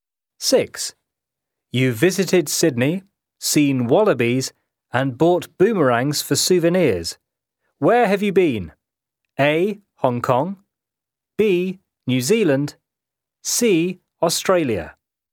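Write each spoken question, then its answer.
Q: Where have you been?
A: C: Australia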